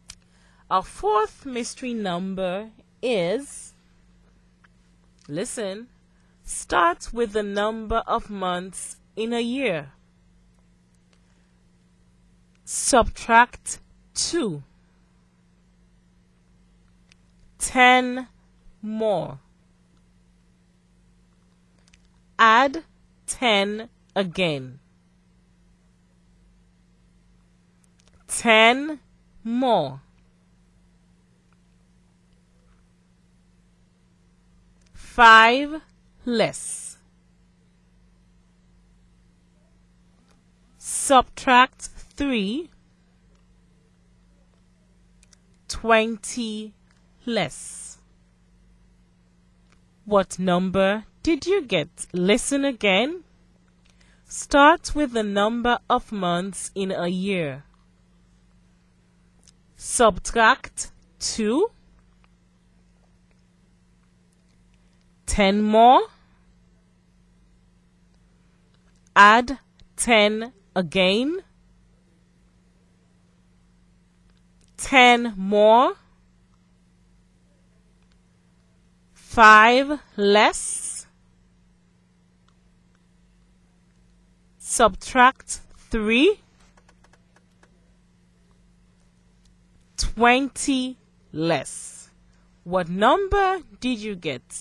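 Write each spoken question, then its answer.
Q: What number did you get?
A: 12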